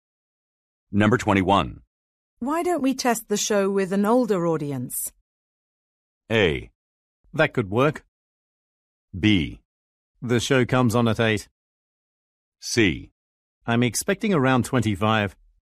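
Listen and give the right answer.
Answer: A: That could work.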